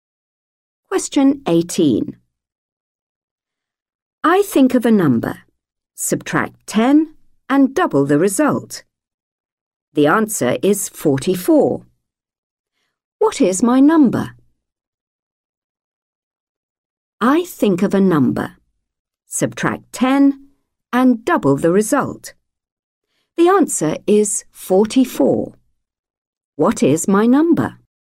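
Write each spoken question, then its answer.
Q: The answer is 44. What is my number?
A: 32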